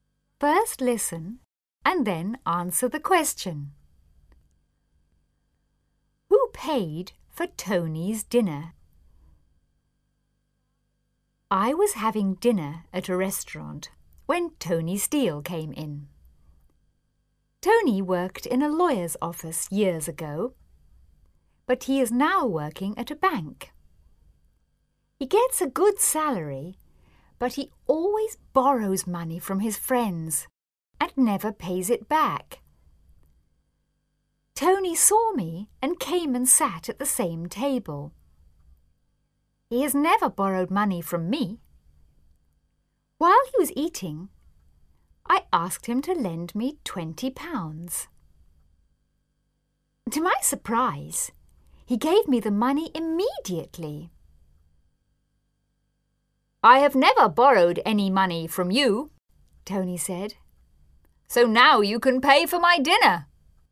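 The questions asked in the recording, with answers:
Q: Who paid for Tony's dinner?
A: The writer (the narrator) paid for it.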